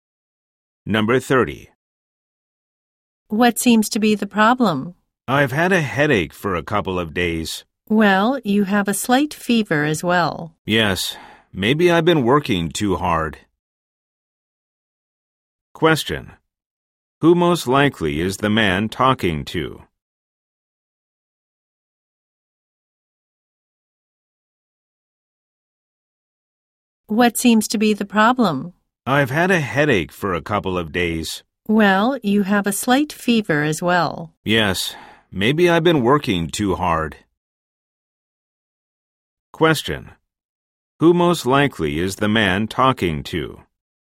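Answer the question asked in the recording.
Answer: A doctor.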